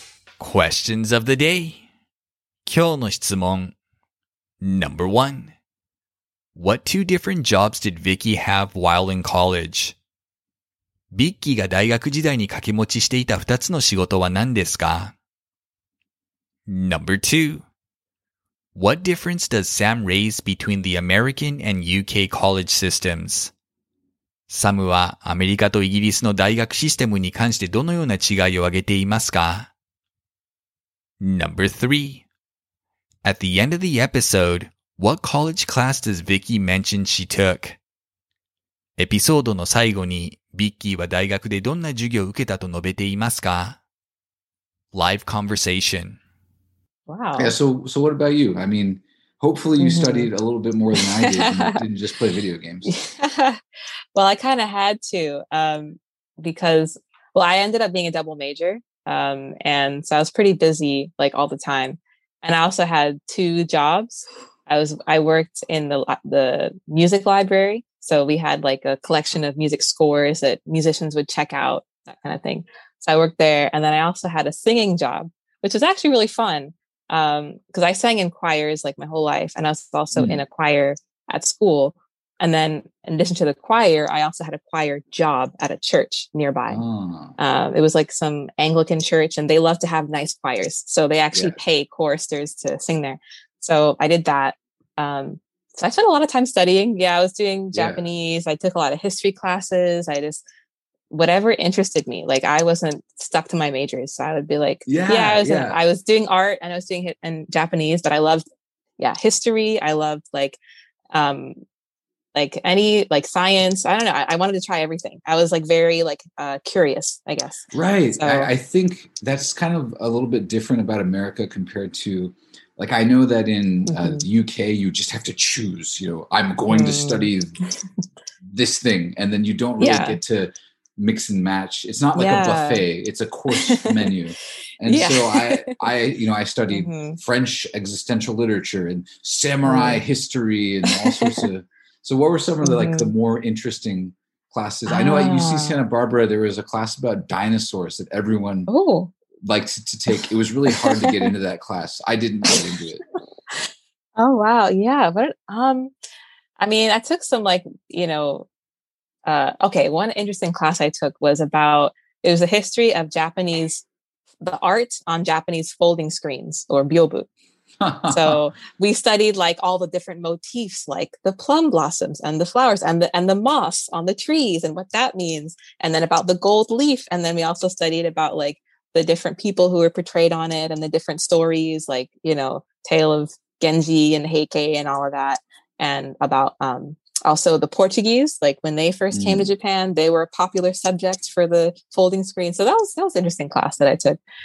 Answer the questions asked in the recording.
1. She worked in a music library as well as in a choir.
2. Sam says that in America, a student has flexibility in the courses they take, while in the UK, a student must choose a course of study and stick to that throughout college.
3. She took a class on the art of Japanese folding screens, or byobu.